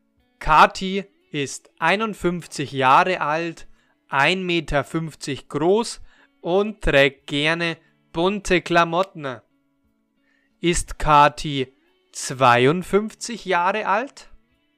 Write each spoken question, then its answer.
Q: Ist Kati 52 Jahre alt?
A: Nein, sie ist nicht 52 Jahre alt.